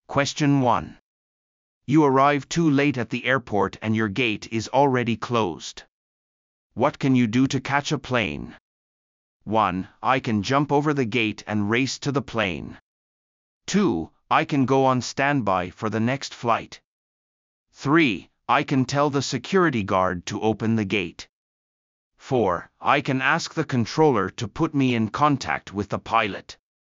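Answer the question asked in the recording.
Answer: 2: I can go on standby for the next flight.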